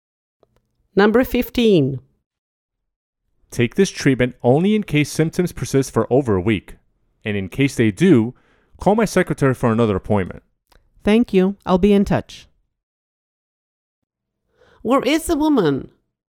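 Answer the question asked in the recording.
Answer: At the doctor's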